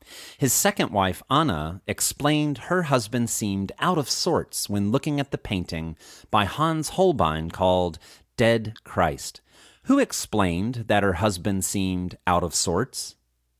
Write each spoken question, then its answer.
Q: Who explained that her husband seemed out of sorts?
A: His second wife, Anna, explained that her husband seemed out of sorts.